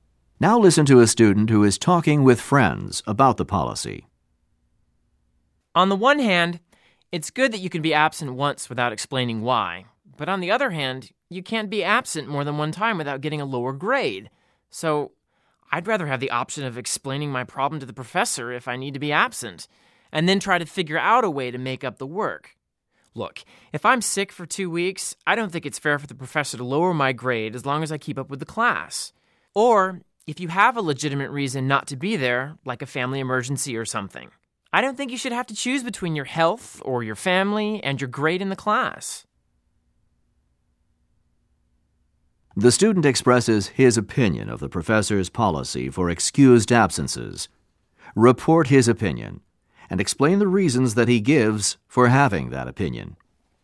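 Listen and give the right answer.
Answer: He dislikes the policy. He would rather explain his problem to the professor and make up the work. It is unfair to lower his grade for a long illness if he keeps up, or to make students choose between their health or family and their grade.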